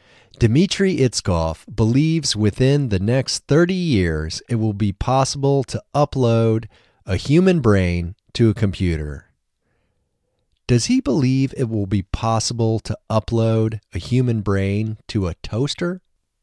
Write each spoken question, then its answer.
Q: Does he believe it will be possible to upload a human brain to a toaster?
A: No, he doesn't believe it will be possible to upload a human brain to a toaster.